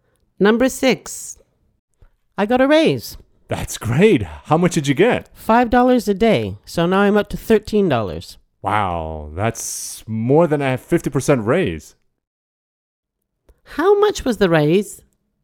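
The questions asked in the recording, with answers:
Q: How much was the raise?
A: $5 a day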